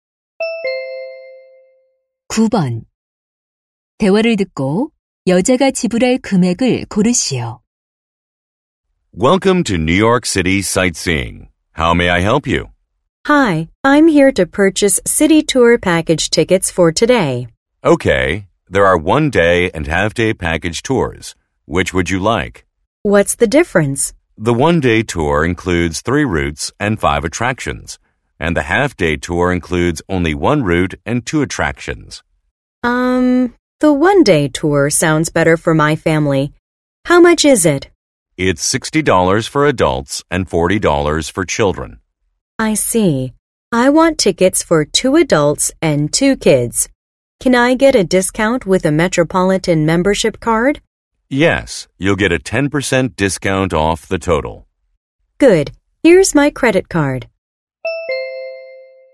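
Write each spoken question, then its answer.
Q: 대화를 듣고 여자가 지불할 금액을 고르시오.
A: $180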